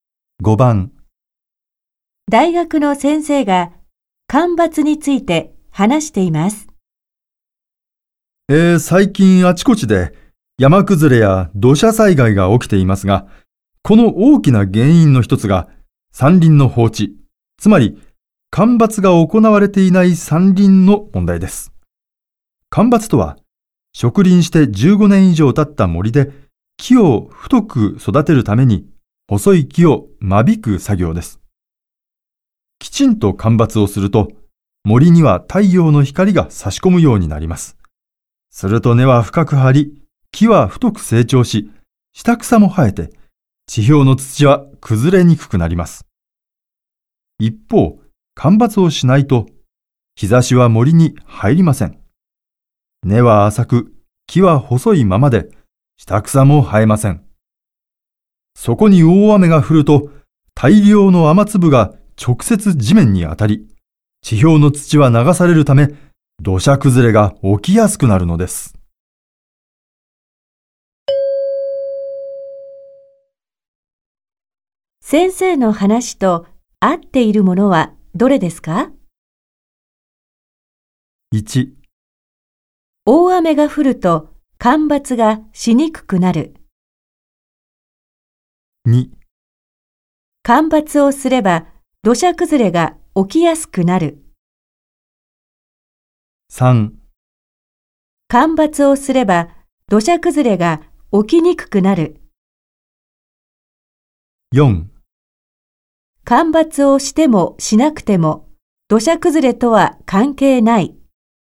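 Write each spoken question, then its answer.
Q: 先生の話と合っているものはどれですか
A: 3: 干ばつをすれば土砂崩れが起きにくくなる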